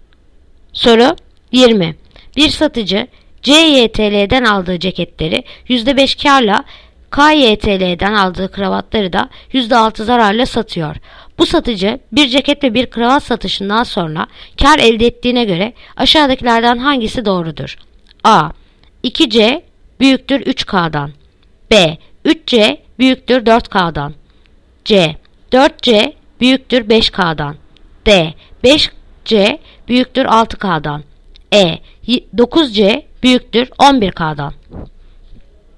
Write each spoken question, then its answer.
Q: Bu satıcı bir ceket ve bir kravat satışından sonra kar elde ettiğine göre aşağıdakilerden hangisi doğrudur?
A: Yanıt Diyarbakır. 5C büyüktür 6K'dan.